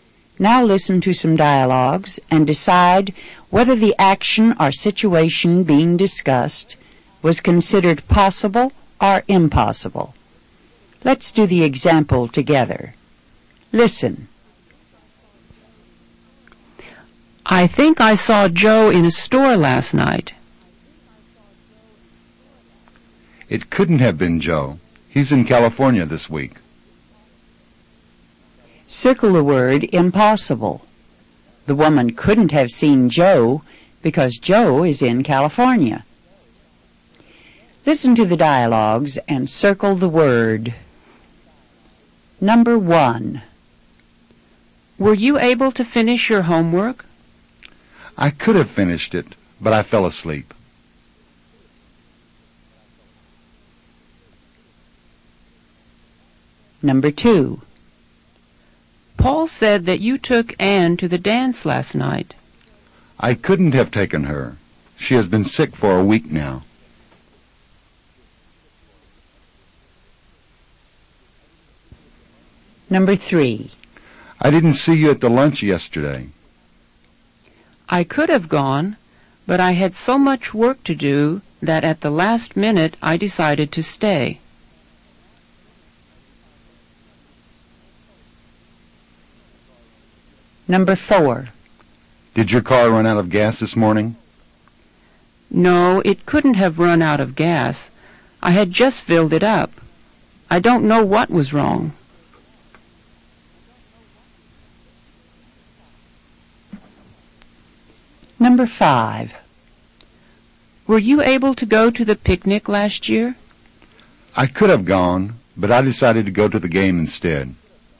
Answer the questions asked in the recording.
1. Number one is possible.
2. Number two is impossible.
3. Number three is possible.
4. Number four is impossible.
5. Number five is possible.